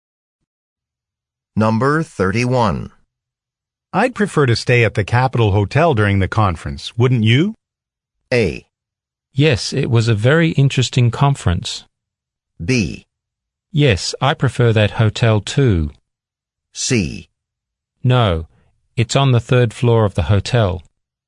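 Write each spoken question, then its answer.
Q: I'd prefer to stay at the Capitol Hotel during the conference, wouldn't you?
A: B: Yes, I prefer that hotel too.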